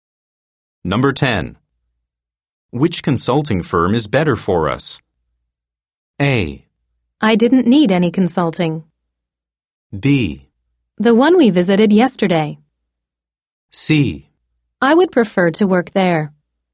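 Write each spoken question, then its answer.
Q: Which consulting firm is better for us?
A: B: The one we visited yesterday.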